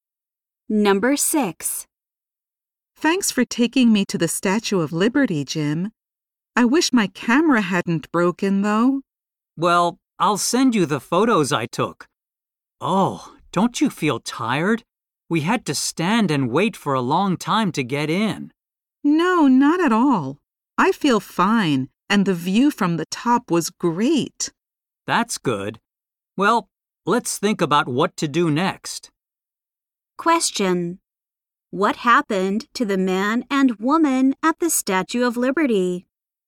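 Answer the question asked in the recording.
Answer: They had to wait in line for a long time.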